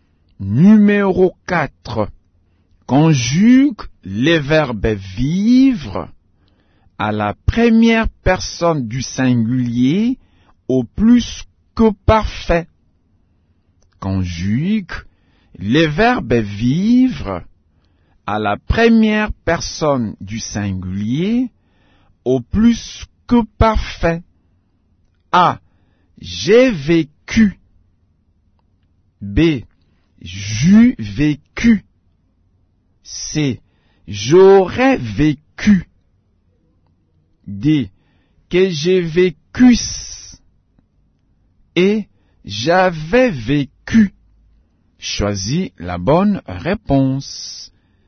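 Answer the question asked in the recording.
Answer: E: J'avais vécu.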